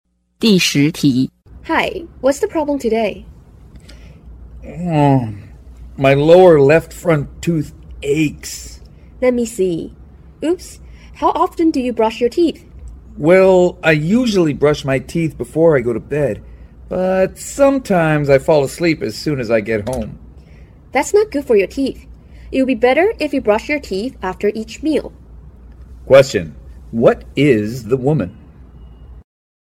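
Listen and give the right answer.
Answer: A dentist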